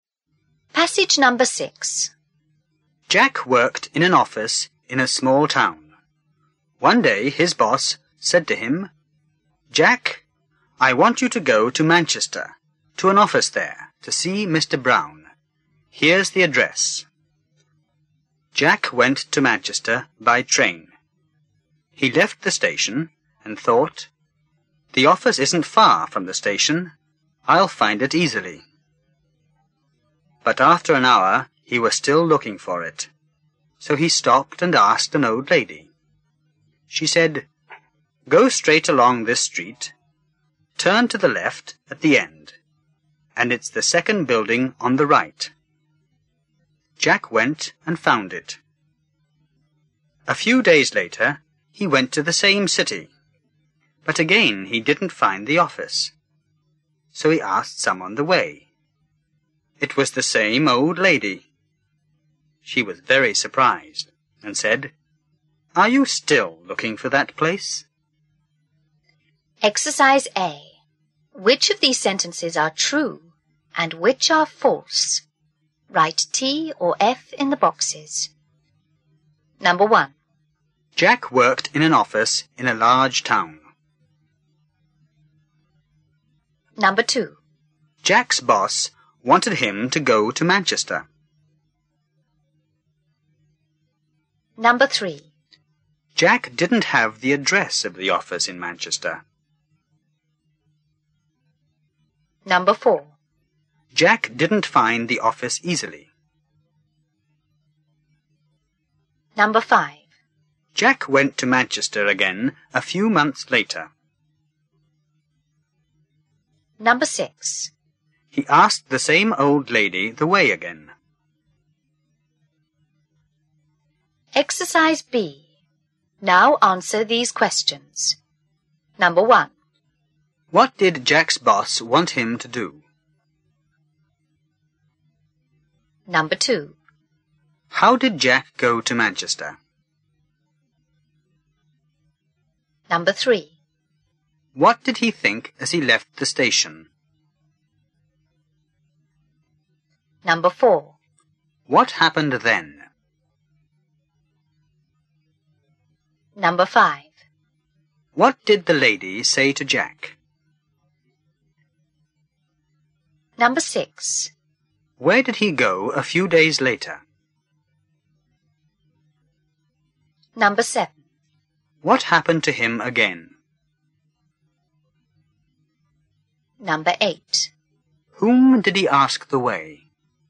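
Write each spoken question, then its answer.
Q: What did Jack's boss want him to do?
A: Go to an office in Manchester to see Mr. Brown

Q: How did Jack go to Manchester?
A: By train

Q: What did he think as he left the station?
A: The office isn't far from the station; he'd find it easily

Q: What happened then?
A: After an hour he was still looking for it, so he asked an old lady

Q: What did the lady say to Jack?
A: Go straight along this street, turn left at the end, and it's the second building on the right

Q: Where did he go a few days later?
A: To Manchester (the same city)

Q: What happened to him again?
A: He didn't find the office

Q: Whom did he ask the way?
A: The same old lady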